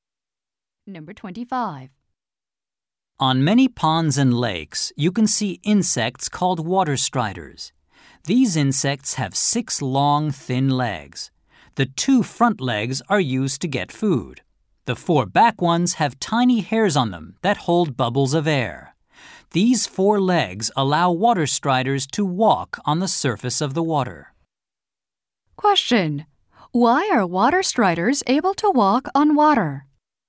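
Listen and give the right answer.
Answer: Tiny hairs on their back legs hold air bubbles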